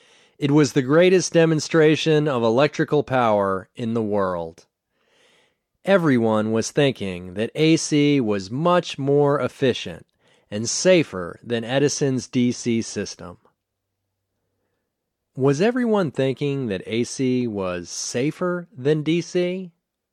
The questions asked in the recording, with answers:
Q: Was everyone thinking that AC was safer than DC?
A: Yes, everyone was thinking that AC was safer than DC.